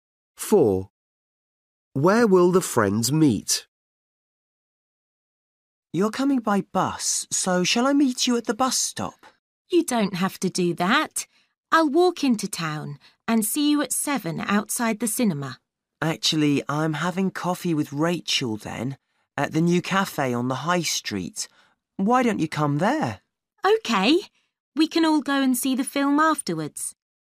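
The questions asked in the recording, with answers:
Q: Where will the friends meet?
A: At the new cafe on the high street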